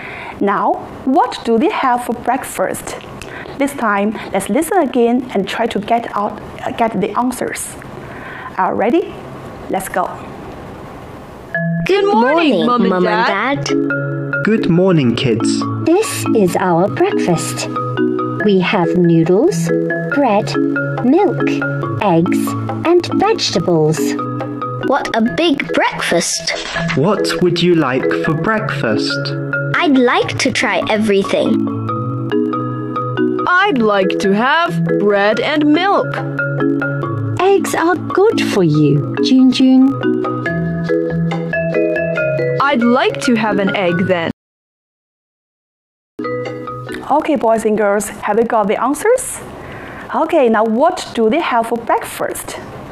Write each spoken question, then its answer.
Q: Now, what do they have for breakfast?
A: Yes, they have noodles, bread, milk, eggs, and vegetables.